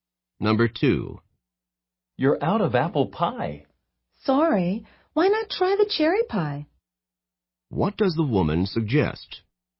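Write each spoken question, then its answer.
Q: What does the woman suggest?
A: Trying the cherry pie instead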